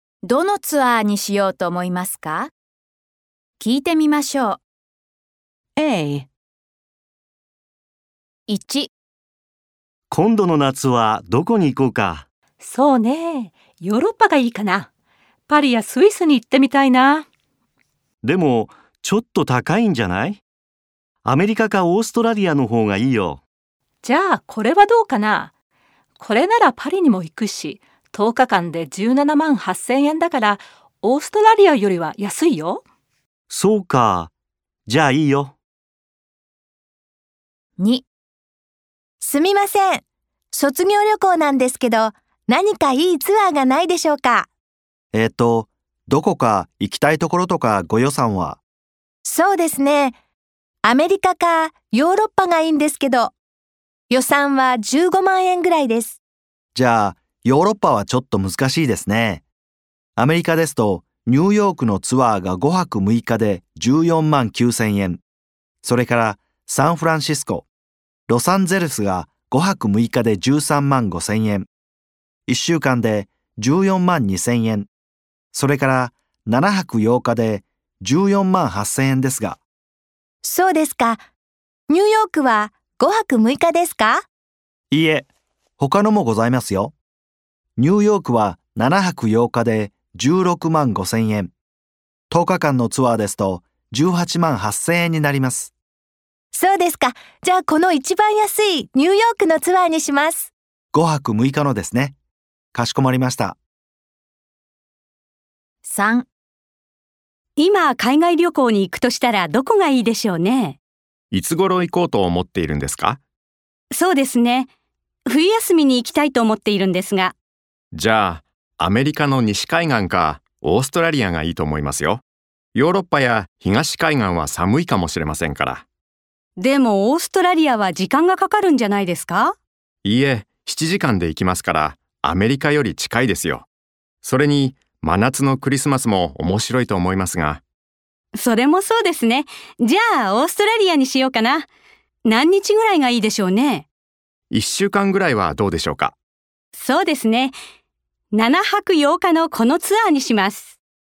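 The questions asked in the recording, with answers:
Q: どのツアーにしようと思いますか?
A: パリにも行くヨーロッパのツアー(10日間で17万8千円)

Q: どのツアーにしようと思いますか?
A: ニューヨークのツアー(5泊6日で14万9千円)

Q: どのツアーにしようと思いますか?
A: オーストラリアのツアー(7泊8日)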